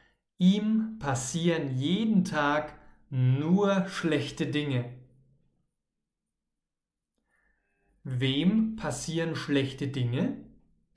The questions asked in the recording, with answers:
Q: Wem passieren schlechte Dinge?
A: Ihm, also Sandro.